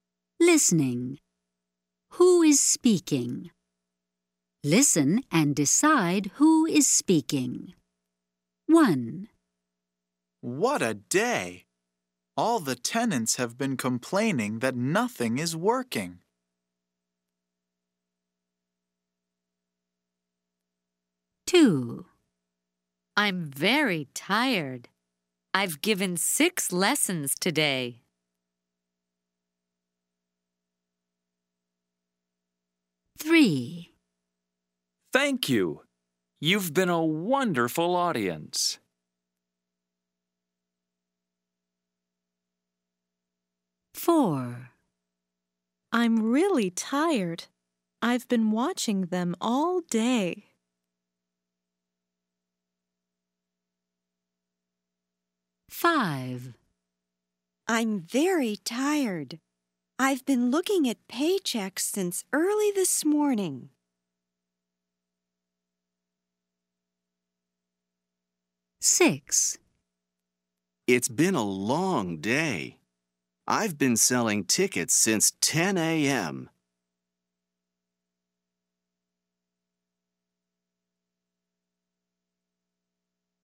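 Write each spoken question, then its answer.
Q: Who is speaking?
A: A teacher

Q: Who is speaking?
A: A ticket seller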